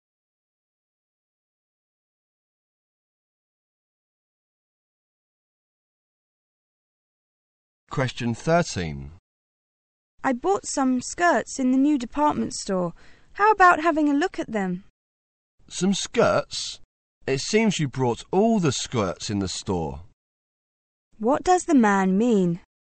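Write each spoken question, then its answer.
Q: What does the man mean?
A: The woman bought too many skirts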